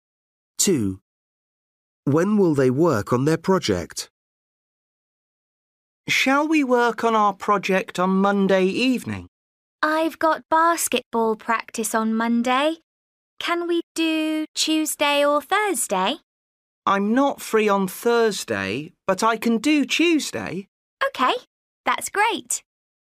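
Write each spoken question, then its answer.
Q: When will they work on their project?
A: Tuesday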